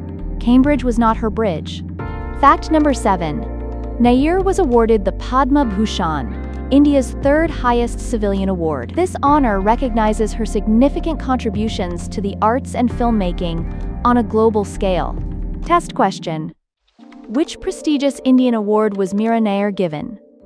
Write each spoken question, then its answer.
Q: Which prestigious Indian award was Mira Nair given?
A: Correct answer, Padma Bhushan.